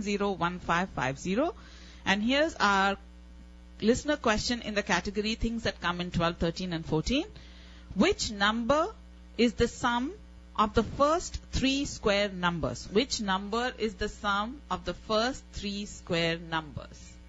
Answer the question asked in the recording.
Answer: And the answer is 14.